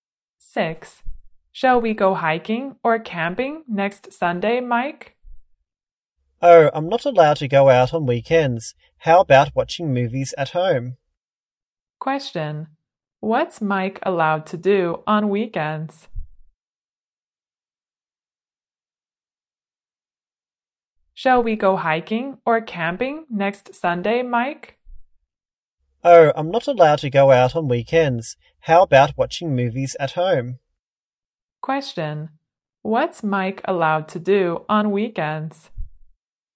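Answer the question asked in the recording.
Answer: Watch movies at home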